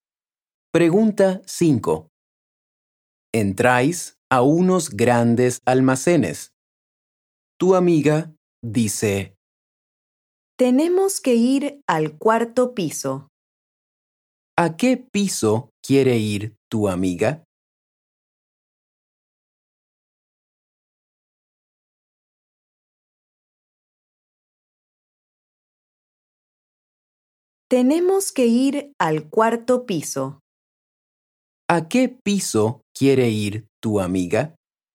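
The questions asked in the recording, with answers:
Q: ¿A qué piso quiere ir tu amiga?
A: al cuarto piso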